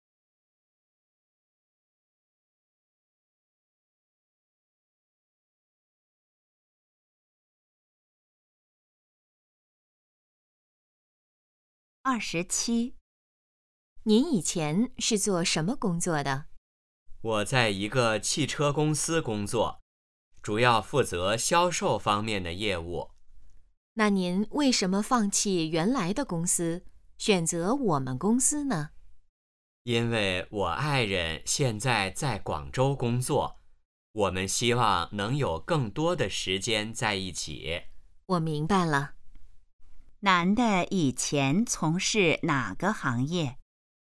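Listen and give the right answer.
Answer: 汽车销售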